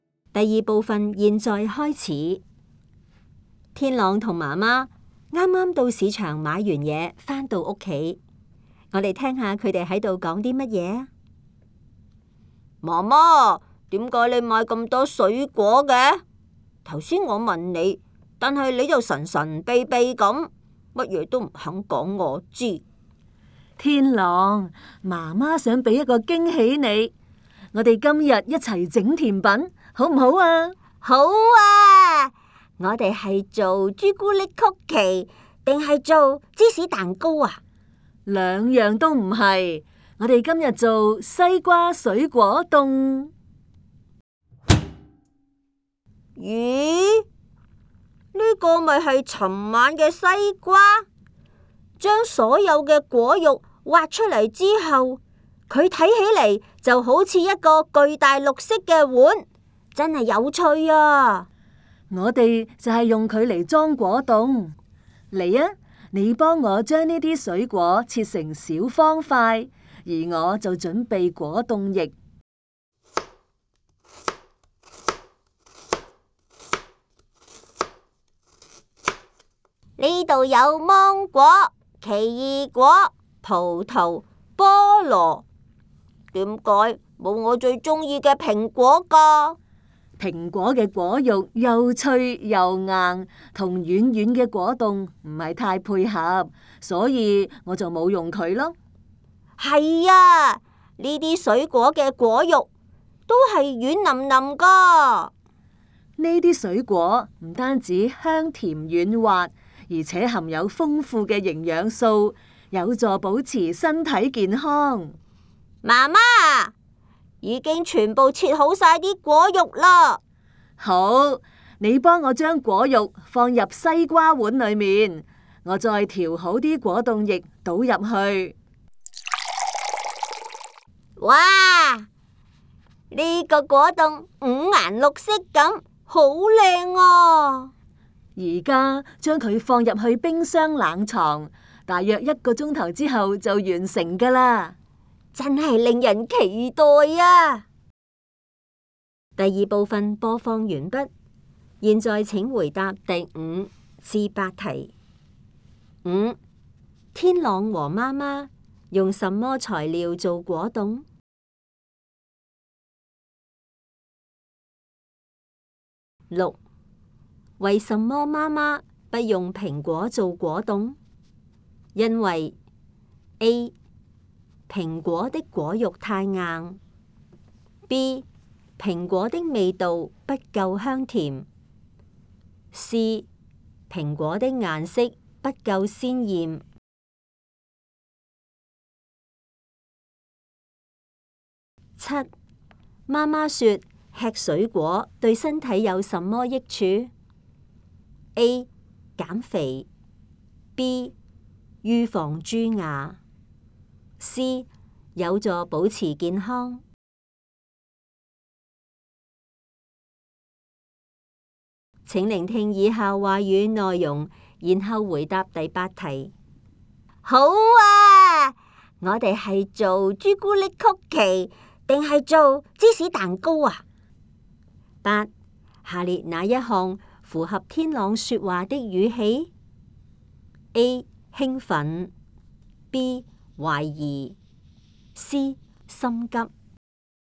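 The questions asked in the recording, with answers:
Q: 天朗和妈妈用什么材料做果冻?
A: 西瓜和芒果、奇异果、葡萄、菠萝等水果

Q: 为什么妈妈不用苹果做果冻?因为 A. 苹果的果肉太硬, B. 苹果的味道不够香甜, C. 苹果的颜色不够鲜艳。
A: A: 苹果的果肉太硬

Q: 妈妈说吃水果对身体有什么益处?A. 减肥, B. 预防蛀牙, C. 有助保持健康。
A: C: 有助保持健康

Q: 下列哪一项符合天朗说话的语气? A. 兴奋, B. 怀疑, C. 心急。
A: A: 兴奋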